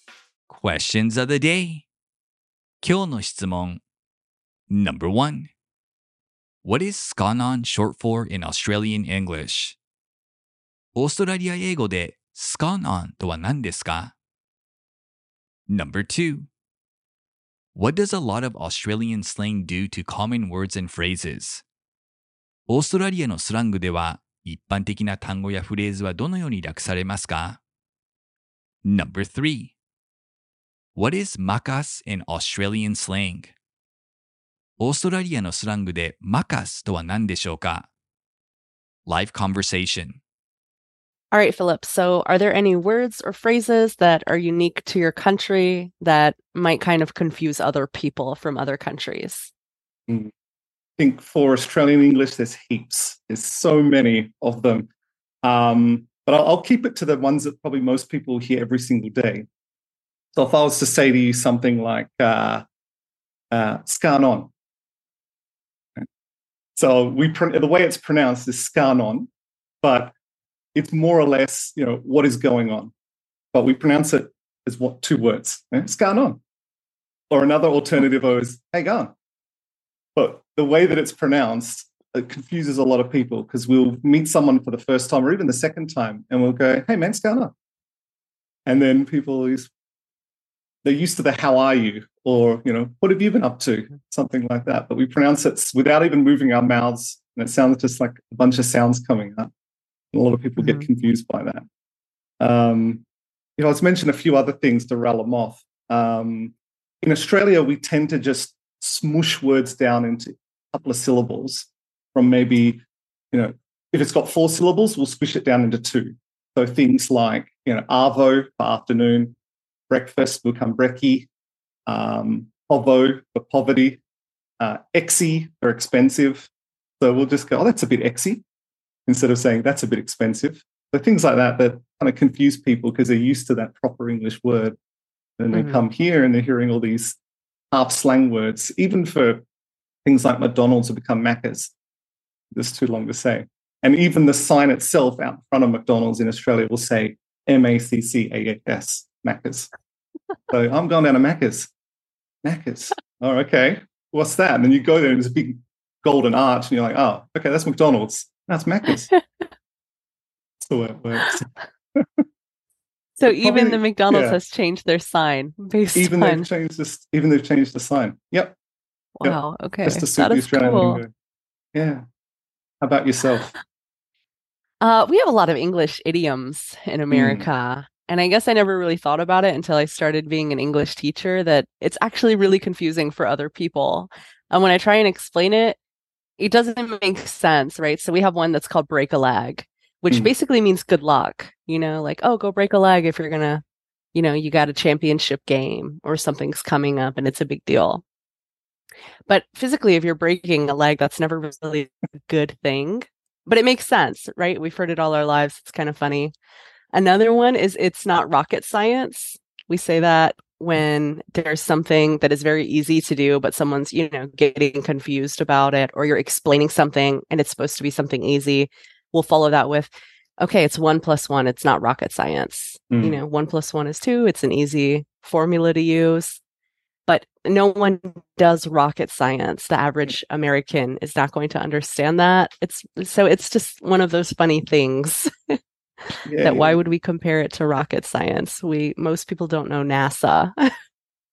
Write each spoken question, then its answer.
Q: What is scanon short for in Australian English?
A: It's a shortened way of saying what's going on.

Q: What does a lot of Australian slang do to common words and phrases?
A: Australian slang tends to reduce words down to around 2 syllables, so a word like expensive becomes exy.

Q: What is makas in Australian slang?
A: Macca's is Australian slang for McDonald's, the fast food chain.